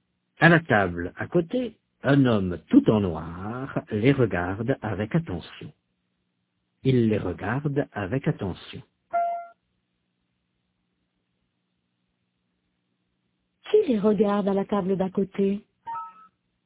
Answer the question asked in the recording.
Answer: Un homme tout en noir.